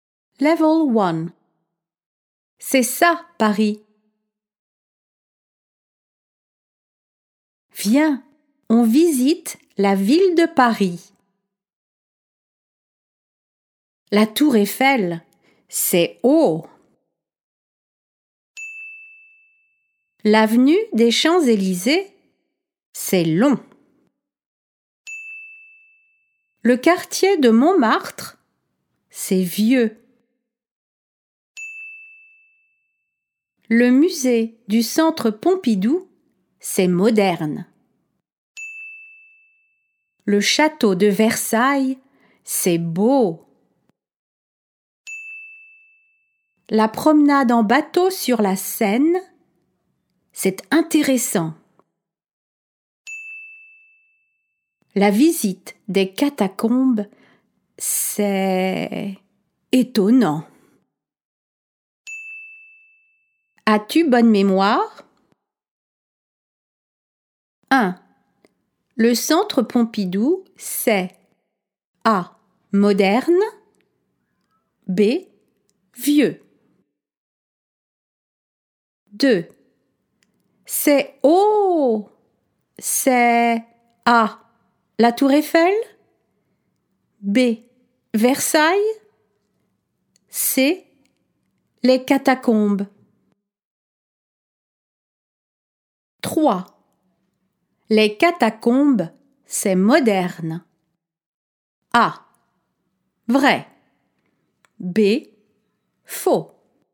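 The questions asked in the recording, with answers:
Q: Le centre Pompidou, c'est A. moderne, B. vieux.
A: A: moderne

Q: C'est haut. C'est A. la tour Eiffel, B. Versailles, C. les catacombes.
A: A: la tour Eiffel

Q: Les catacombes, c'est moderne. A. vrai. B. faux.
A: B: faux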